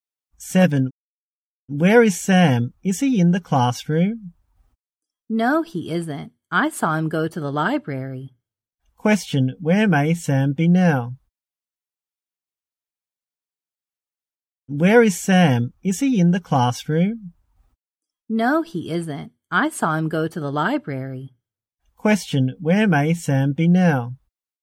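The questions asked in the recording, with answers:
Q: Where may Sam be now?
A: In the library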